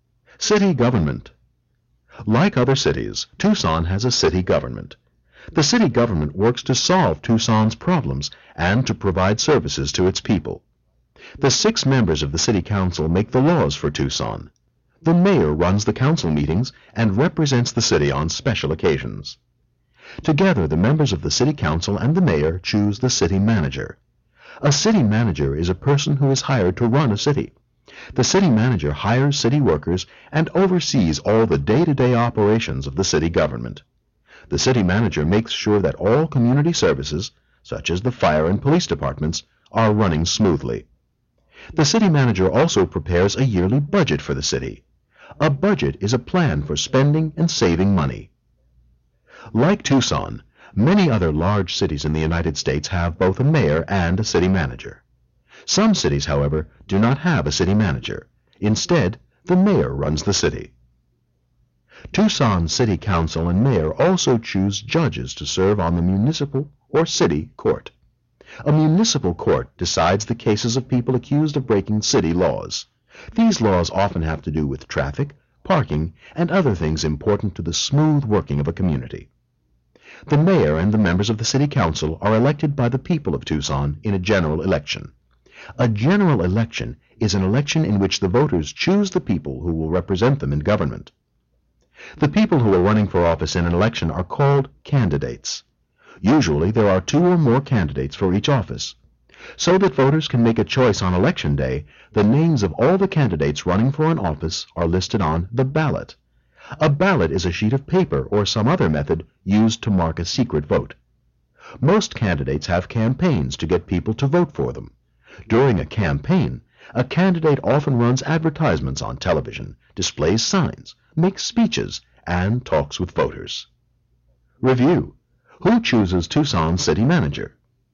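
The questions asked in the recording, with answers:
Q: Who chooses Tucson's city manager?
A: The members of the city council and the mayor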